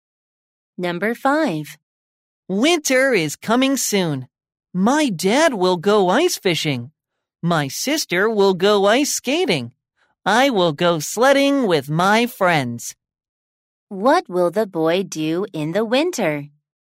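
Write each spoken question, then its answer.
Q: What will the boy do in the winter?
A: He will go sledding with his friends.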